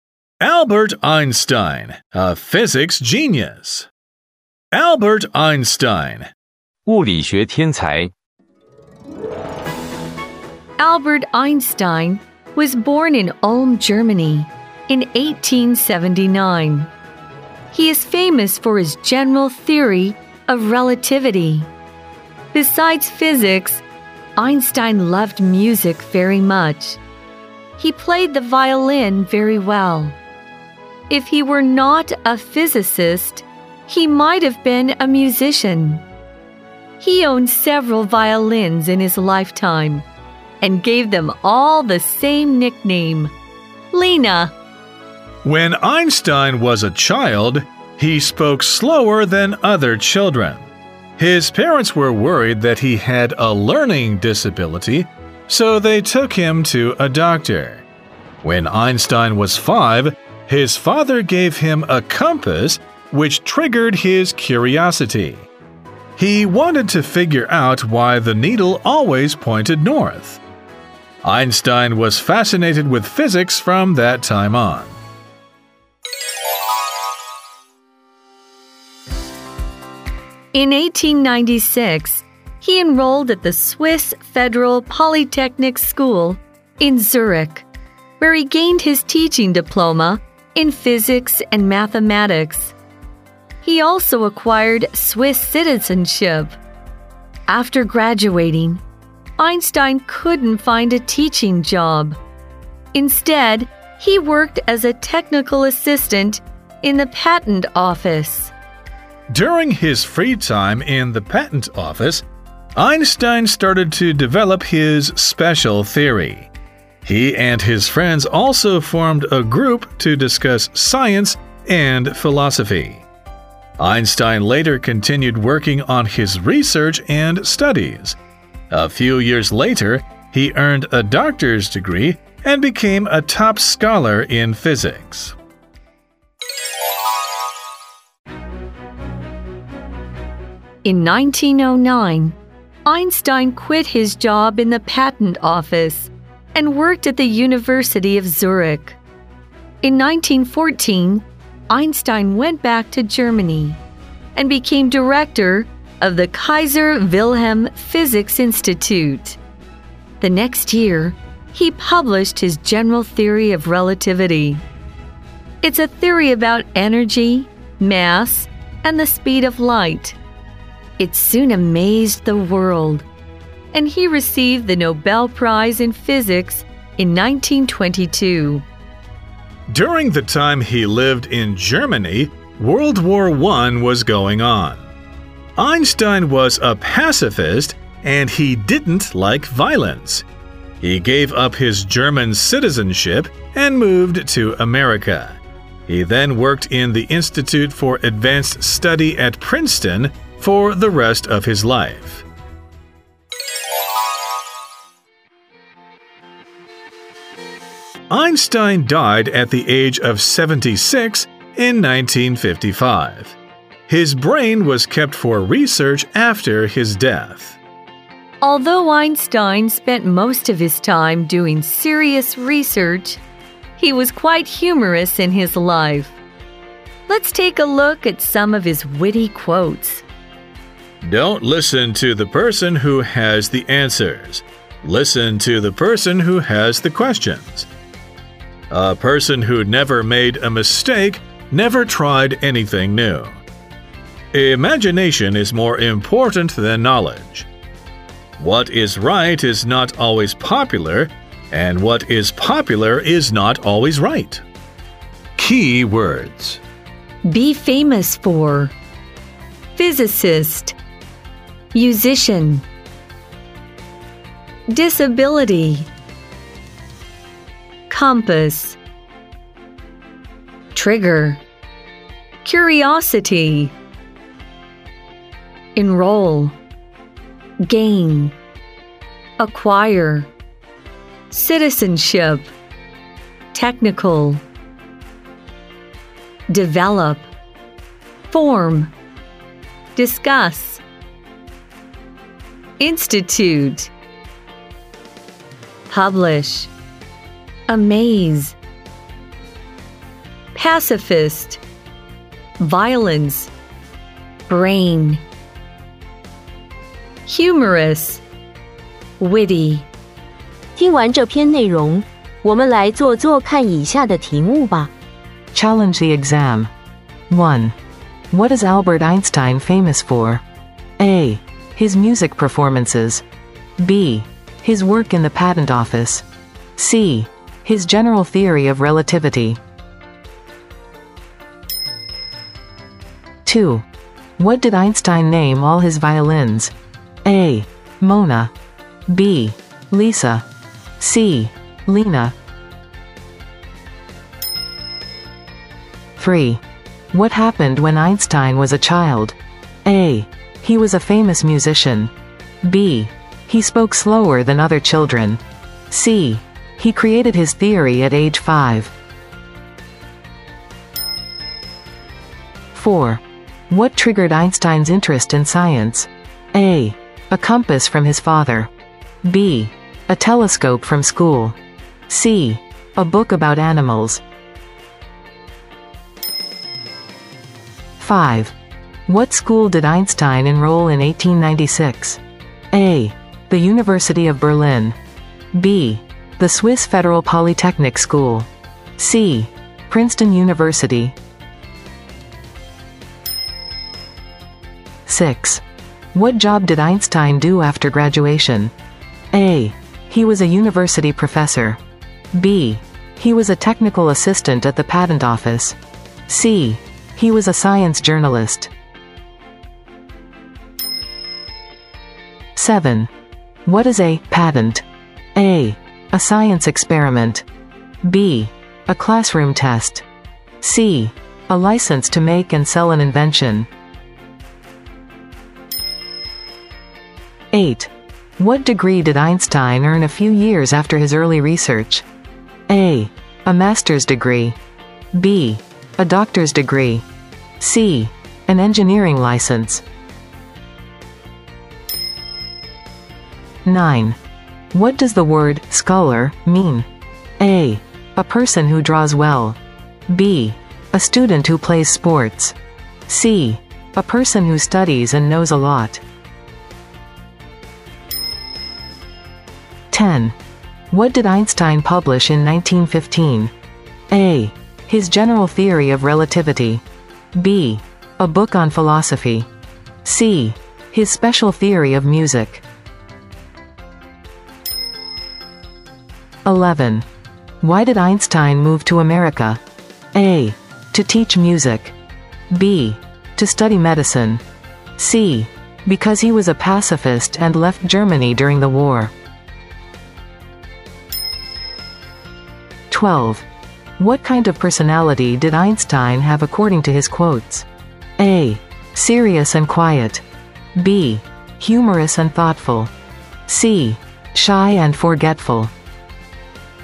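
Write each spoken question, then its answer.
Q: What is Albert Einstein famous for?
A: C: His general theory of relativity.

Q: What did Einstein name all his violins?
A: C: Lena.

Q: What happened when Einstein was a child?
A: B: He spoke slower than other children.

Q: What triggered Einstein's interest in science?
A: A: A compass from his father.

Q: What school did Einstein enroll in 1896?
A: B: The Swiss Federal Polytechnic School.

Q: What job did Einstein do after graduation?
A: B: He was a technical assistant at the patent office.

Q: What degree did Einstein earn a few years after his early research?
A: B: A doctor's degree.

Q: What did Einstein publish in 1915?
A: A: His general theory of relativity.

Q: Why did Einstein move to America?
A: C: Because he was a pacifist and left Germany during the war.

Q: What kind of personality did Einstein have according to his quotes?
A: B: Humorous and thoughtful.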